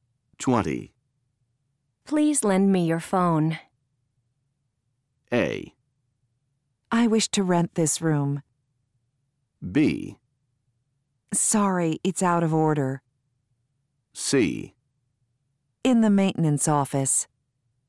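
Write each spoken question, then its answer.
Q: Please lend me your phone.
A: B: Sorry, it's out of order.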